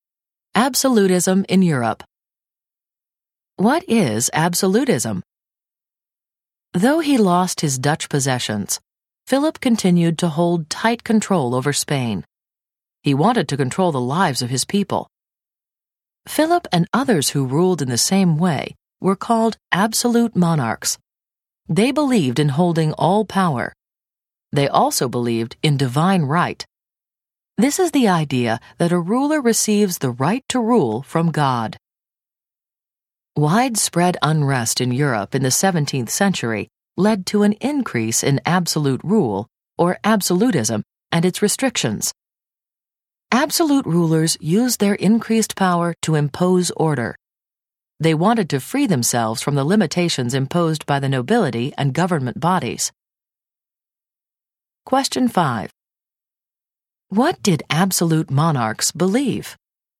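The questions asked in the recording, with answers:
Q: What did absolute monarchs believe?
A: In holding all power and in divine right to rule from God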